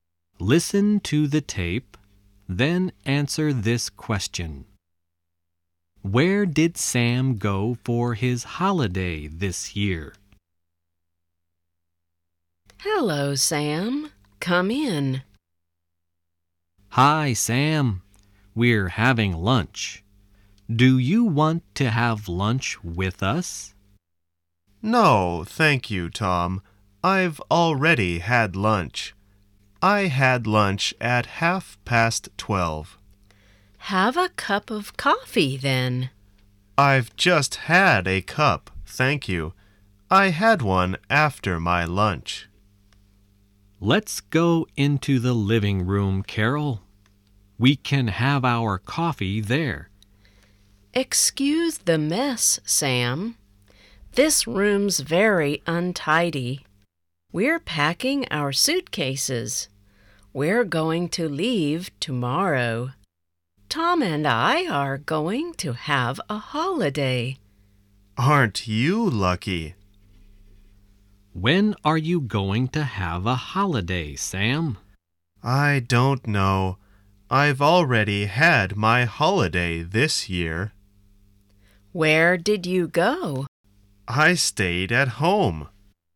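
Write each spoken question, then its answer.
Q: Where did Sam go for his holiday this year?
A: He stayed at home.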